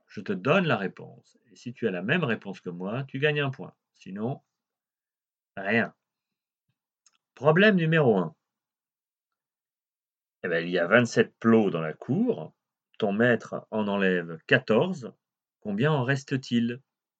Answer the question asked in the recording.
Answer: Réponse attendue, 13.